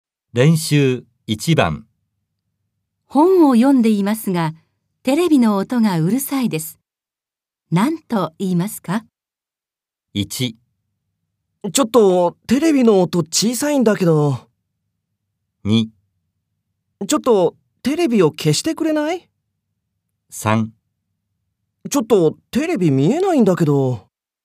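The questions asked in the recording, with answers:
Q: 本を読んでいますが、テレビの音がうるさいです。何と言いますか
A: 2: ちょっとテレビを消してくれない?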